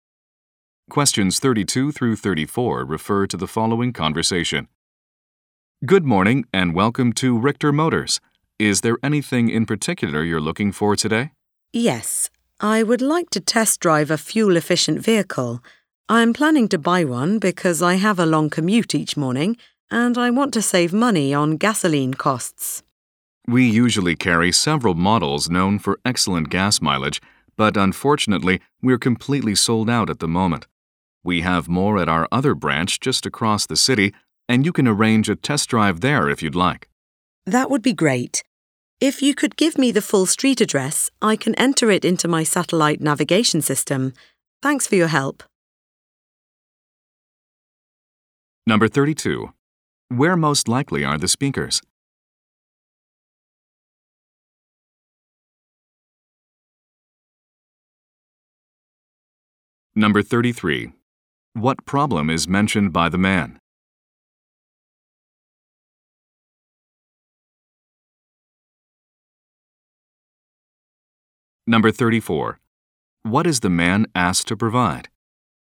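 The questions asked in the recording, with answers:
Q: Where most likely are the speakers?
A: At a car dealership

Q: What problem is mentioned by the man?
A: The fuel-efficient models are sold out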